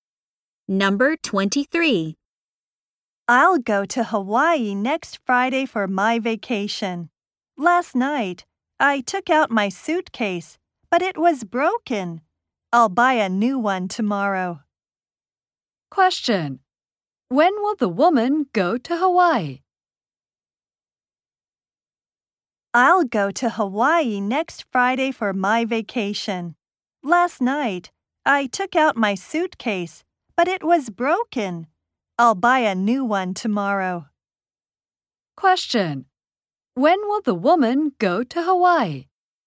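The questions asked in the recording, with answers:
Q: When will the woman go to Hawaii?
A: Next Friday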